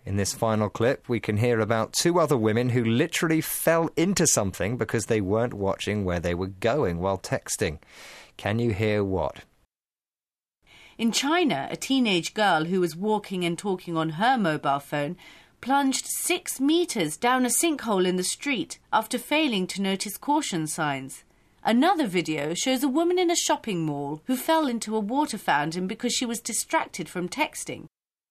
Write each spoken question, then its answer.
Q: Can you hear what?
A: Well, a teenage girl in China plunged, or fell, 6 metres down a sinkhole.